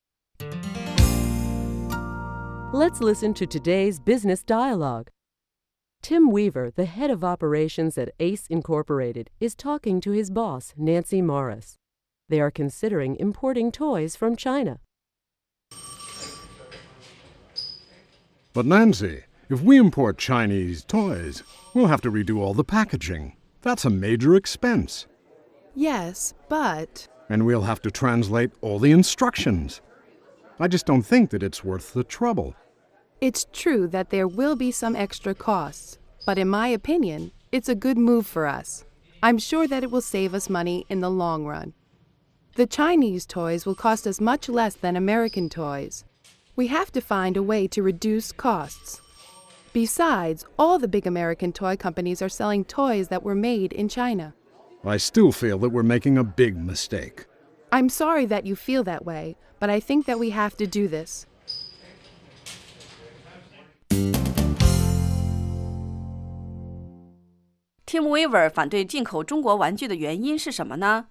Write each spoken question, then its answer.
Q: Tim Weaver 反对进口中国玩具的原因是什么呢?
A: 如果我们从中国进口玩具,我们必须要进行重新包装。这是 Tim Weaver 反对进口中国玩具的原因之一。